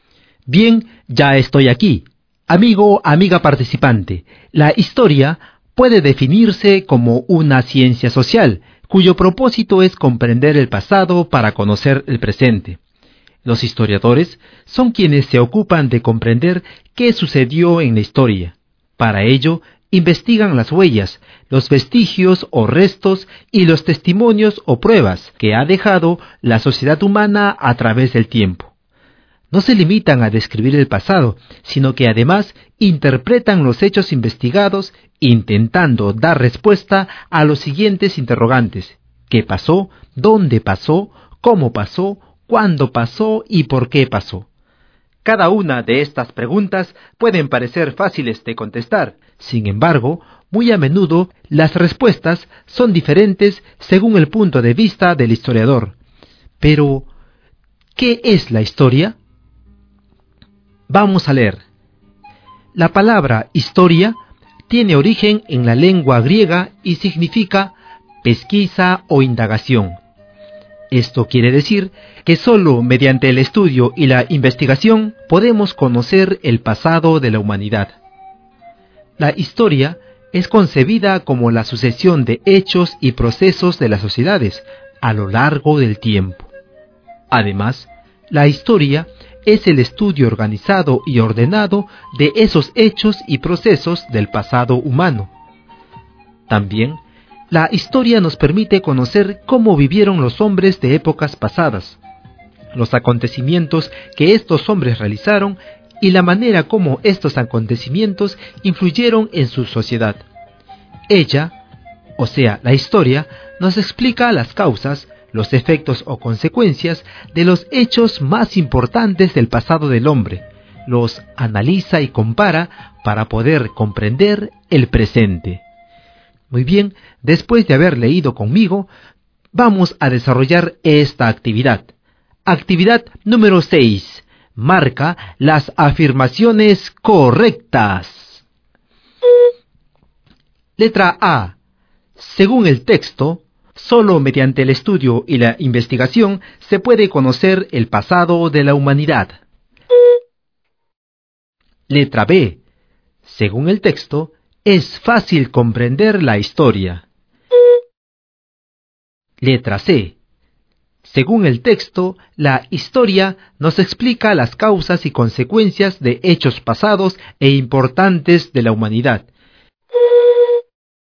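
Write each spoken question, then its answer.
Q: Según el texto, solo mediante el estudio y la investigación se puede conocer el pasado de la humanidad.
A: Correcta

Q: Según el texto, es fácil comprender la historia.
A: Incorrecta

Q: Según el texto, la historia nos explica las causas y consecuencias de hechos pasados e importantes de la humanidad.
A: Correcta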